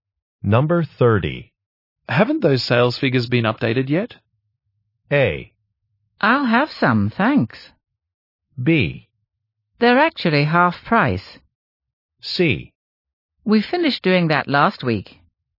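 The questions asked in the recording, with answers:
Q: Haven't those sales figures been updated yet?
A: C: We finished doing that last week.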